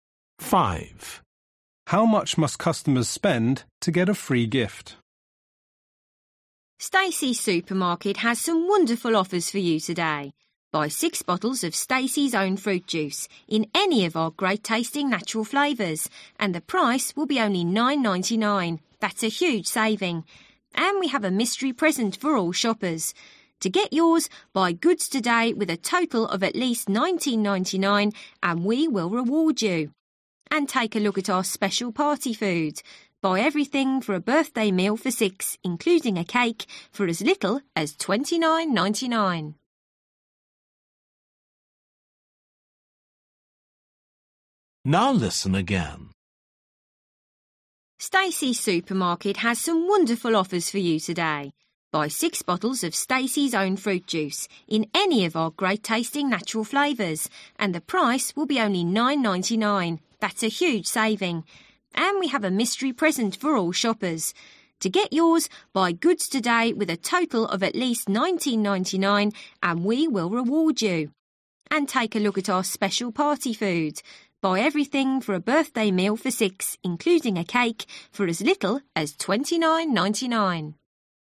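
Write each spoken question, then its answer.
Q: How much must customers spend to get a free gift?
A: $19.99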